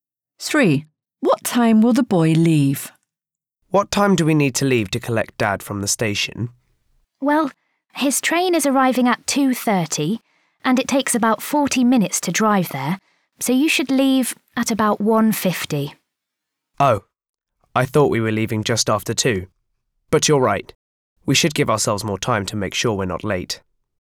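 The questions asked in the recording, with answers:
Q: What time will the boy leave?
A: At about 1:50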